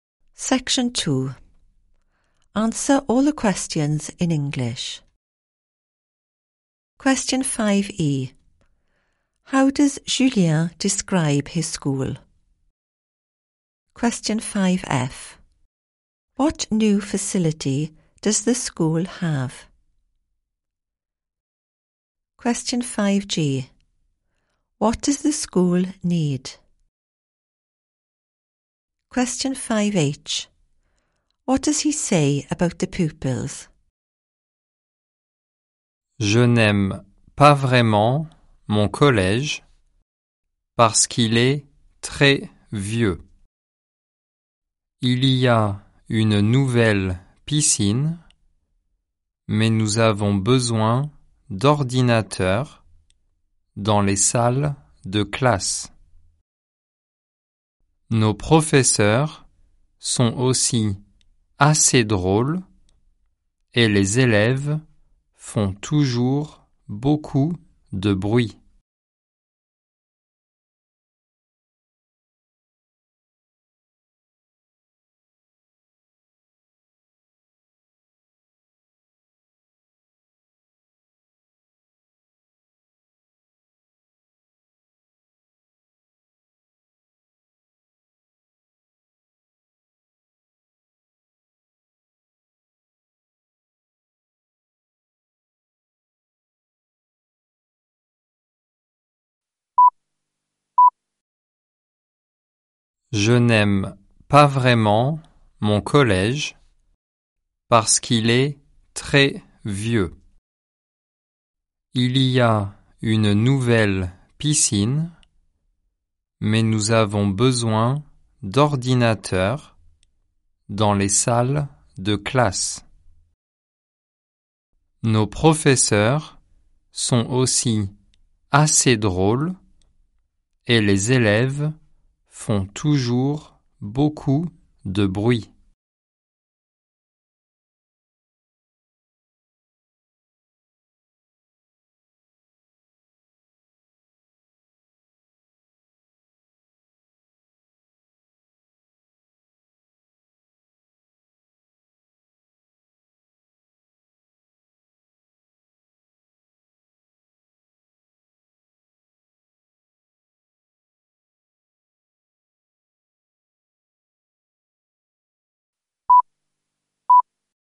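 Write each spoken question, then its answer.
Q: How does Julien describe his school?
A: Very old

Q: What new facility does the school have?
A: A swimming pool

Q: What does the school need?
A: Computers in the classrooms

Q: What does he say about the pupils?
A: They always make a lot of noise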